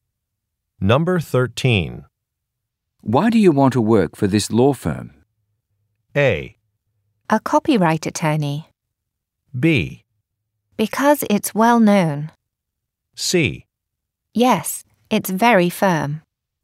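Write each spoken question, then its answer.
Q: Why do you want to work for this law firm?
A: B: Because it's well known.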